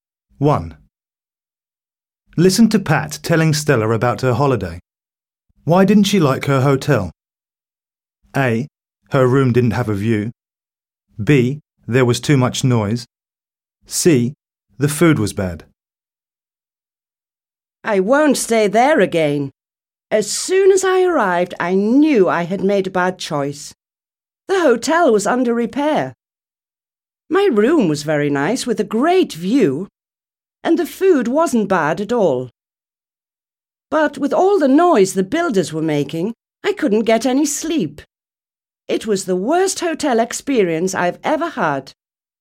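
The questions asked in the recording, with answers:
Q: Why didn't she like her hotel?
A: B: There was too much noise.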